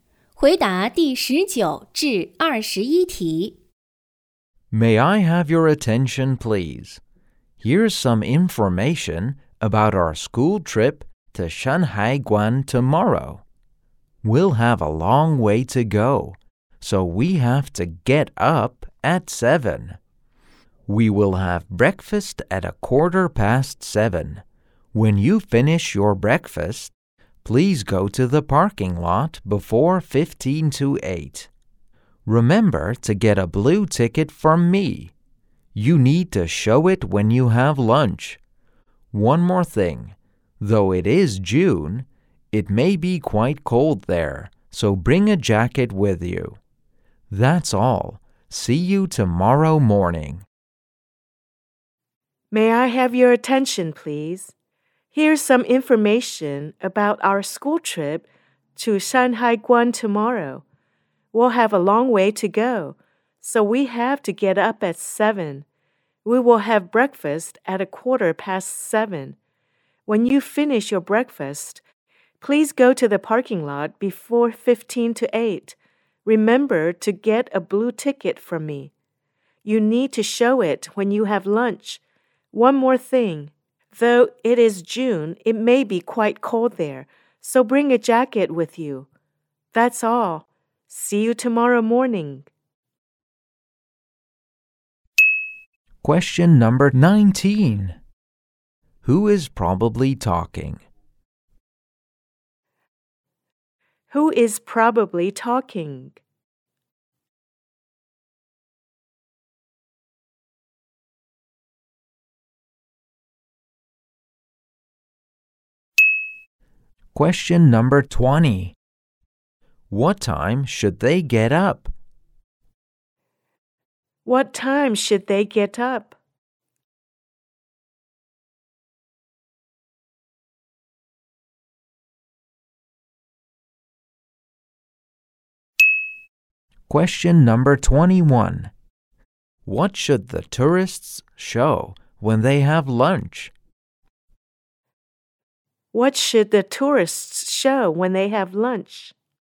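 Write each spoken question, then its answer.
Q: What time should they get up?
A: At 7

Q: What should the tourists show when they have lunch?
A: A blue ticket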